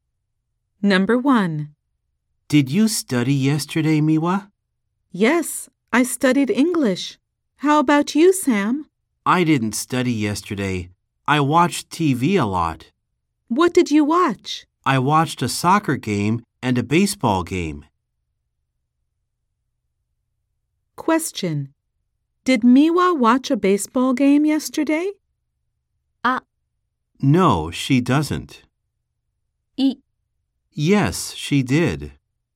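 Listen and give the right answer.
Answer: No, she didn't.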